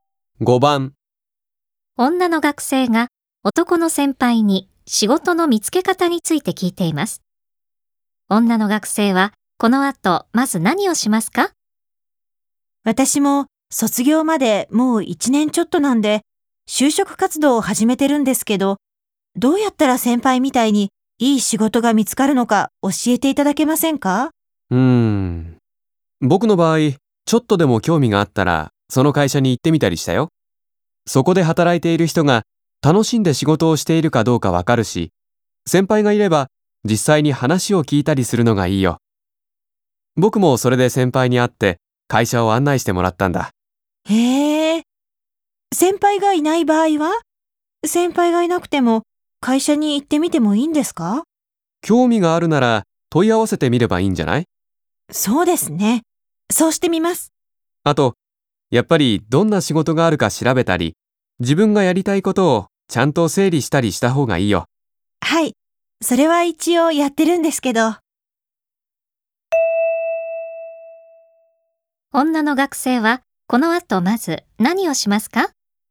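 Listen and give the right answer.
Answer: 興味のある会社に問い合わせる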